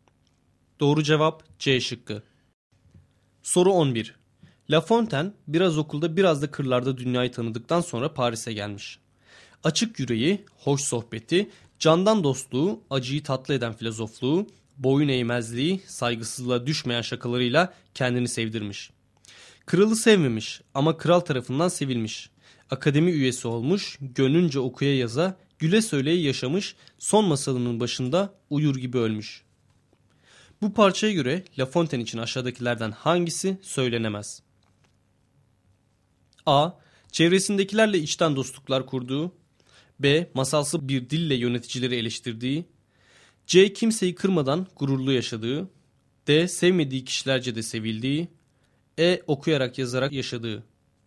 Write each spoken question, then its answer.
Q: Bu parçaya göre La Fontaine için aşağıdakilerden hangisi söylenemez?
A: Doğru cevap B şıkkı.